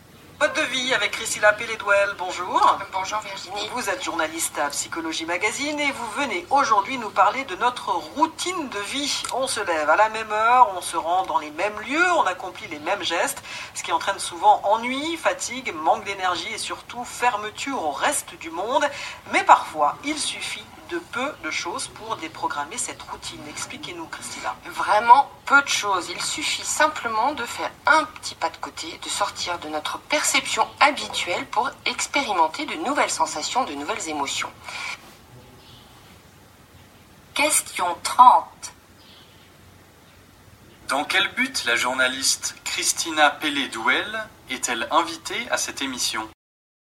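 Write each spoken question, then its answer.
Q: Dans quel but la journaliste Christina Pelédouel est-elle invitée à cette émission ?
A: Pour expliquer comment sortir de la routine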